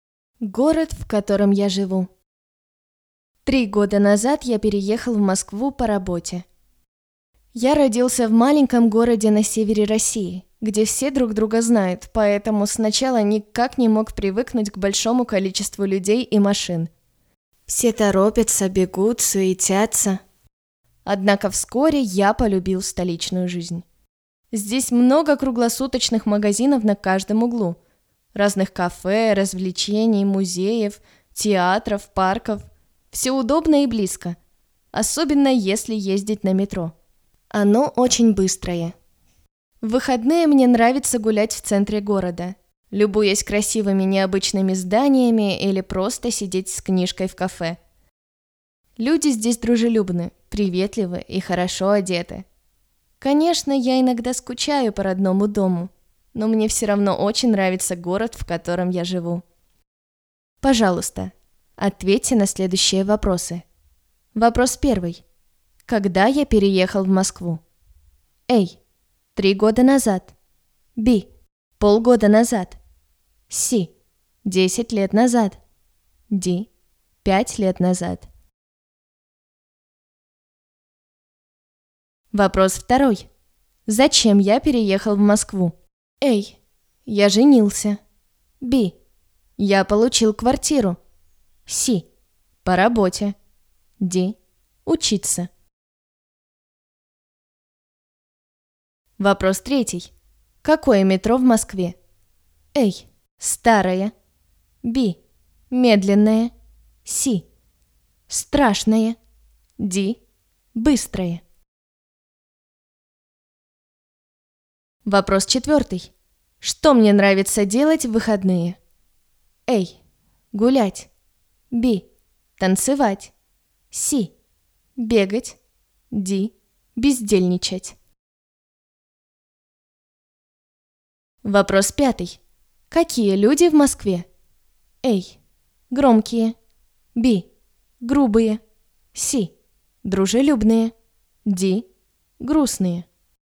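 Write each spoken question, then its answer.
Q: Когда я переехал в Москву?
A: A: 3 года назад

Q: Зачем я переехал в Москву?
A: C: По работе

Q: Какое метро в Москве?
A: D: Быстрое

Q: Что мне нравится делать в выходные?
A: A: Гулять

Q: Какие люди в Москве?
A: C: Дружелюбные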